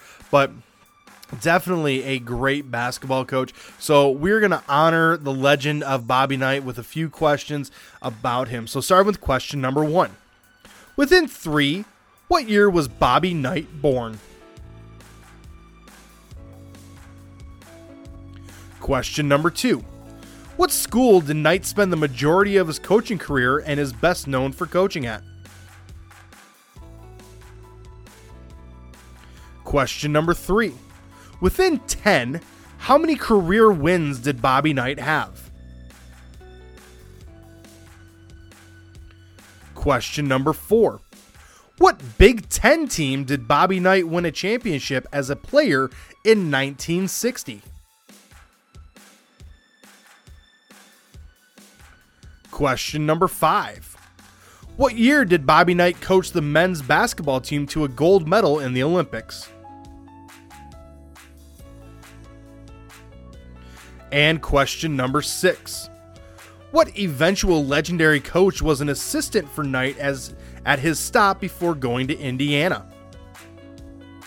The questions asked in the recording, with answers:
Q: What school did Knight spend the majority of his coaching career and is best known for coaching at?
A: That would be Indiana University.